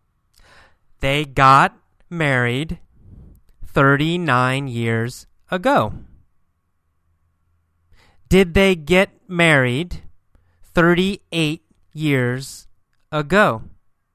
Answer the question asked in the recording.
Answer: No, not 38. They got married 39 years ago.